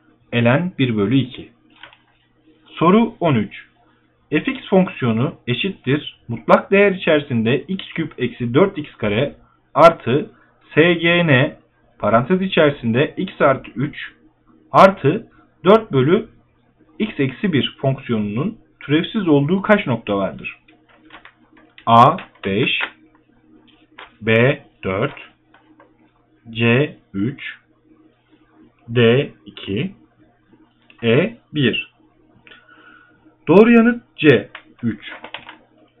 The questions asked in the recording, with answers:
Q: Fx fonksiyonu eşittir mutlak değer içerisinde x küp eksi 4x kare artı sgn parantez içerisinde x artı 3 artı 4 bölü x eksi 1 fonksiyonunun türevsiz olduğu kaç nokta vardır?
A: Doğru yanıt C 3.